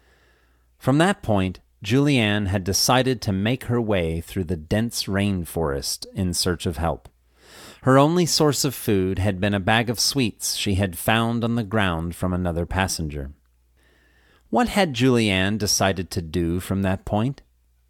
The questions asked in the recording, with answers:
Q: What had Julianne decided to do from that point?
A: She had decided to make her way through the dense rainforest in search of help.